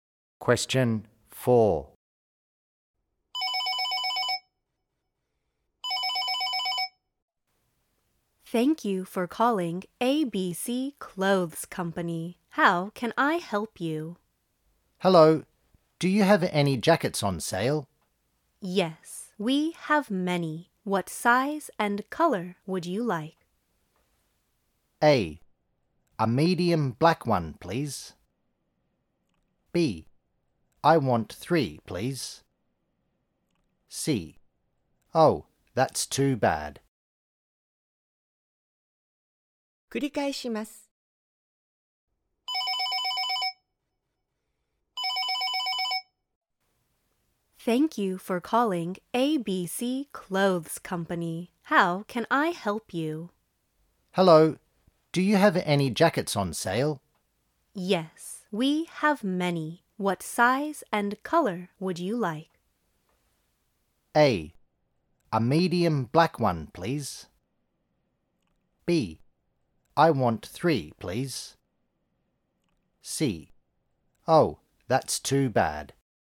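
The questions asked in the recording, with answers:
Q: Yes, we have many. What size and color would you like?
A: A: A medium black one, please.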